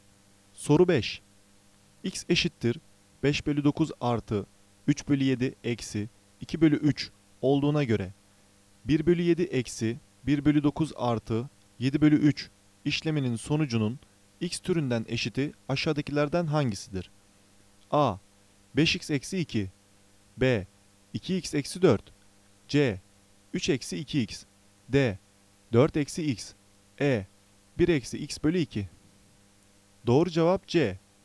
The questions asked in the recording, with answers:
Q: X eşittir 5 bölü 9 artı 3 bölü 7 eksi 2 bölü 3 olduğuna göre 1 bölü 7 eksi 1 bölü 9 artı 7 bölü 3 işleminin sonucunun x türünden eşiti aşağıdakilerden hangisidir?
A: Doğru cevap C.